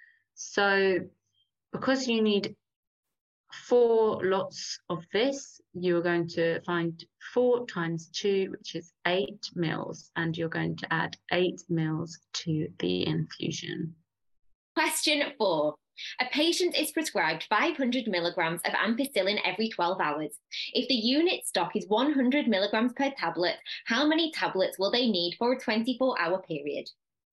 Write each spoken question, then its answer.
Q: If the unit stock is 100 milligrams per tablet, how many tablets will they need for a 24-hour period?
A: So in 24 hours, that means they'll be having 10.